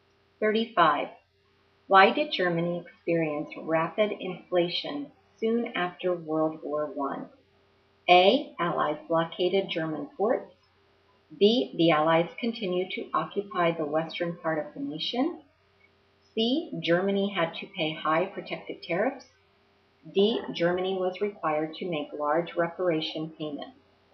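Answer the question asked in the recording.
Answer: D: Germany was required to make large reparation payments.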